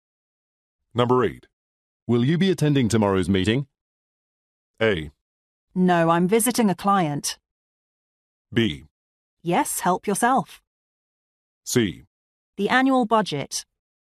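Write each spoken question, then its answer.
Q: Will you be attending tomorrow's meeting?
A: A: No, I'm visiting a client.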